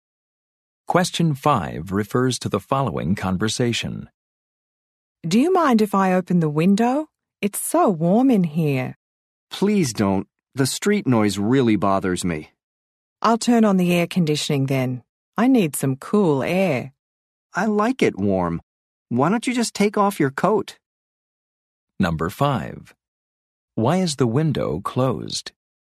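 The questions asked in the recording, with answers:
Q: Why is the window closed?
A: The street noise bothers the speaker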